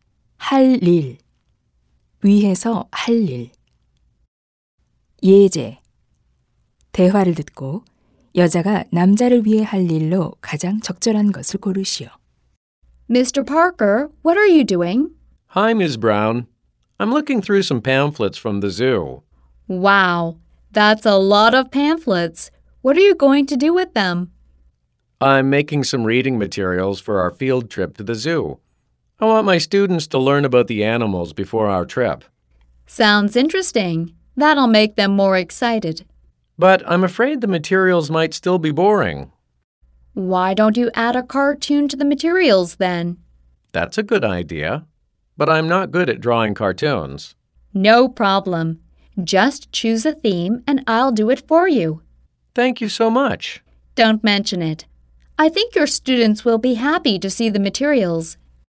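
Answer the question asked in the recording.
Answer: 자료에 넣을 만화 그려 주기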